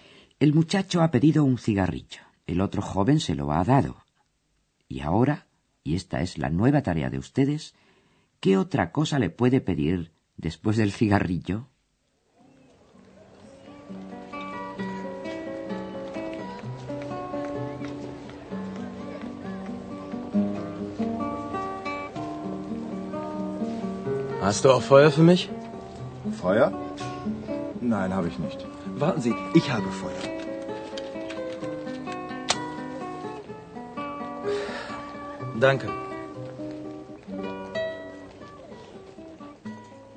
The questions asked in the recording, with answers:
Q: ¿qué otra cosa le puede pedir después del cigarrillo?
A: la palabra Feuer significa fuego